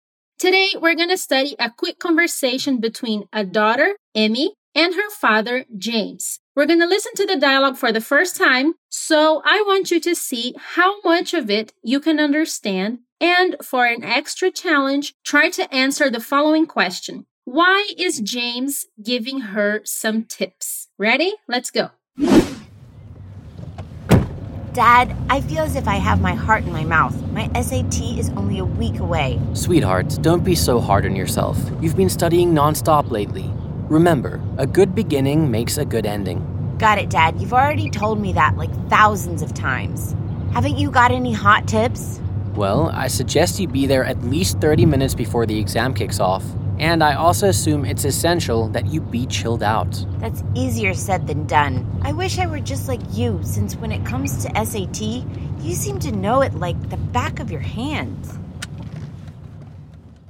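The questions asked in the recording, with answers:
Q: Why is James giving her some tips?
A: Because Emmy is nervous about her SAT, which is only a week away, and she asks him for tips.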